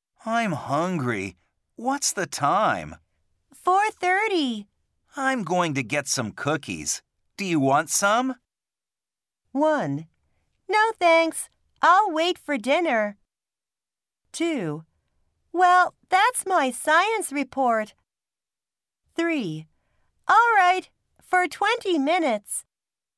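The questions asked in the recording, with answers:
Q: Do you want some?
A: 1: No thanks. I'll wait for dinner.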